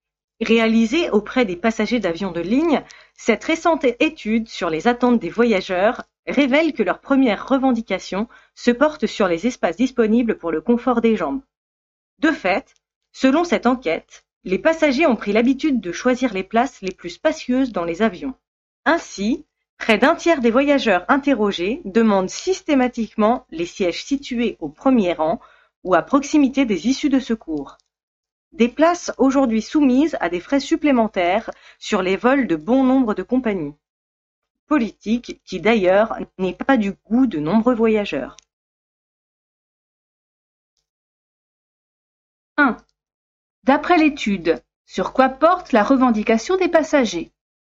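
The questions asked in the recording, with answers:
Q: D'après l'étude, sur quoi porte la revendication des passagers?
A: Sur l'espace disponible pour le confort des jambes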